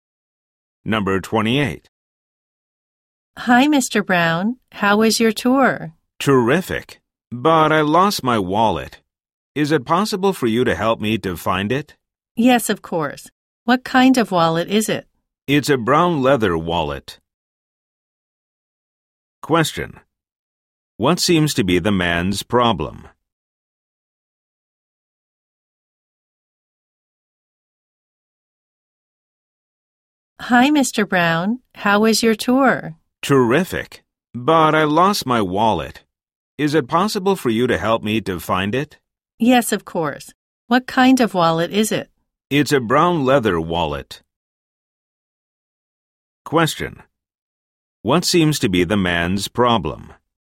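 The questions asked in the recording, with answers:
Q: What seems to be the man's problem?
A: He lost his wallet.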